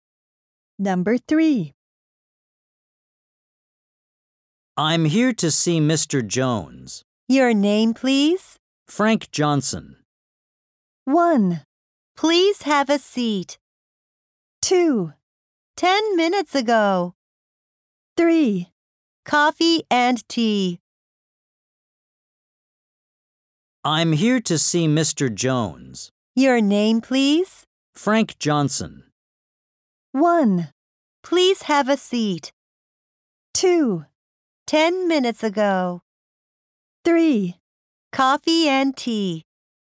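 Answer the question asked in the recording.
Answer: 1: Please have a seat.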